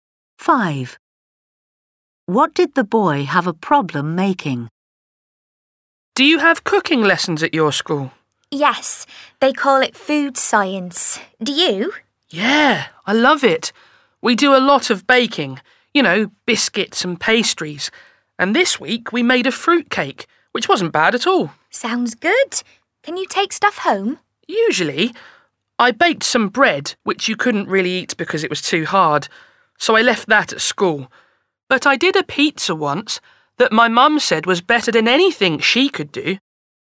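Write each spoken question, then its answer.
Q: What did the boy have a problem making?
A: bread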